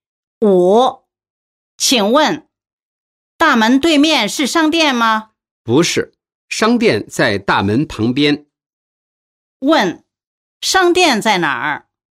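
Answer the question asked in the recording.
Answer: 大门旁边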